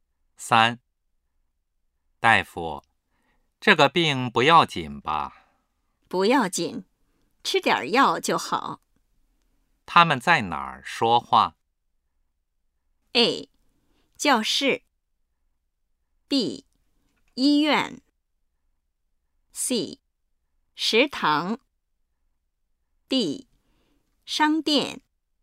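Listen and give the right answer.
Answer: B: 医院。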